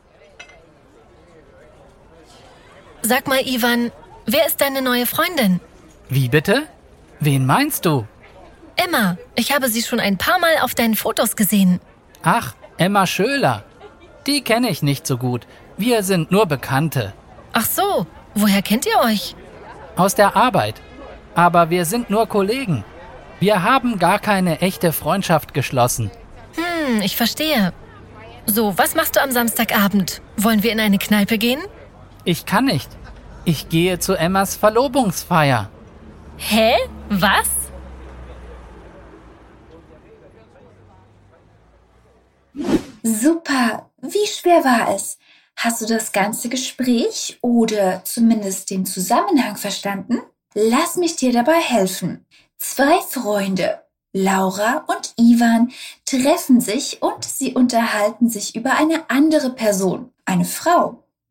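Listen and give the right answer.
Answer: Emma (Emma Schöler)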